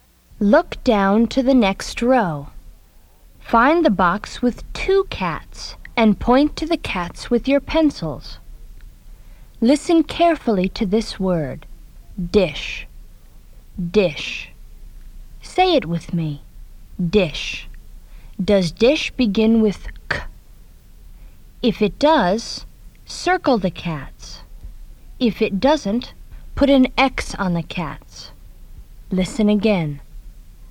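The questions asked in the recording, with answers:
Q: Does dish begin with k?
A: No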